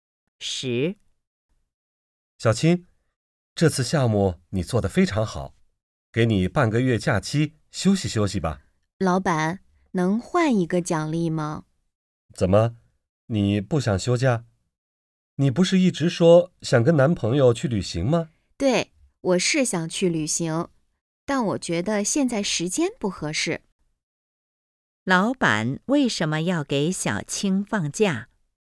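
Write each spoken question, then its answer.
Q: 老板为什么要给小青放假?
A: 项目做得非常好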